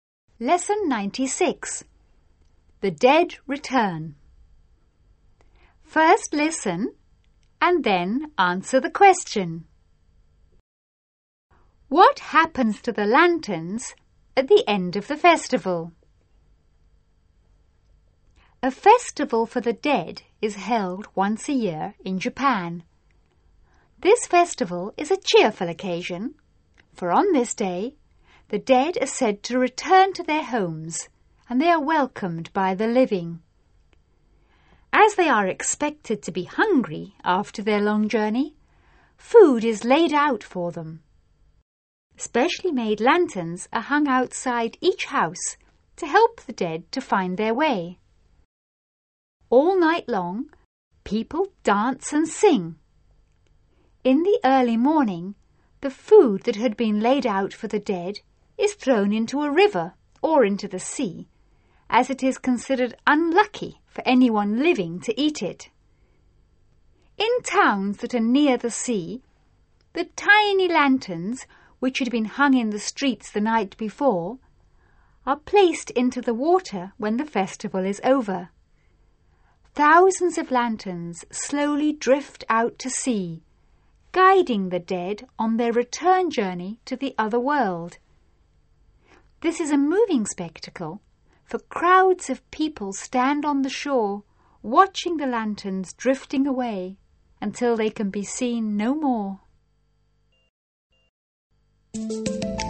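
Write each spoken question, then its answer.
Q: What happens to the lanterns at the end of the festival?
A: They are placed into the water and drift out to sea, guiding the dead back to the other world.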